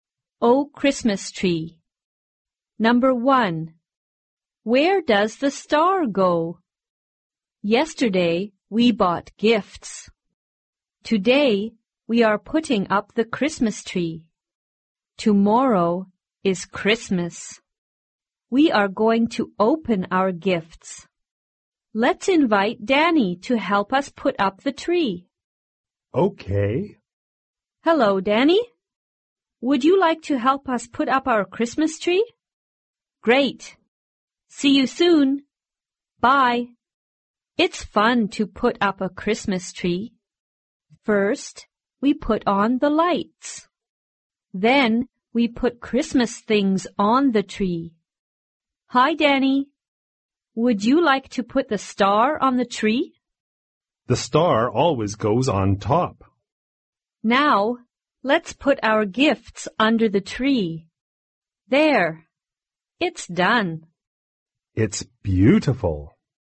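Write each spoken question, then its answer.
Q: Where does the star go?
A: On top of the Christmas tree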